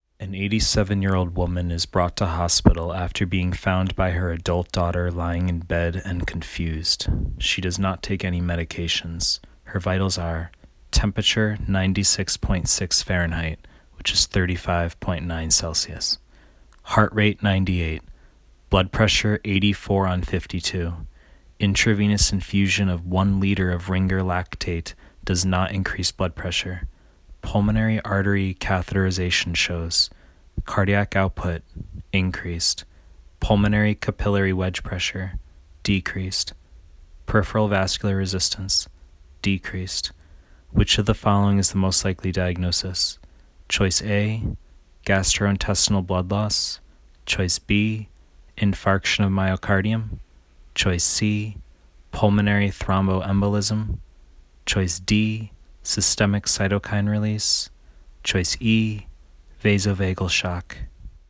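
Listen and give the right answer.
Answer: D: systemic cytokine release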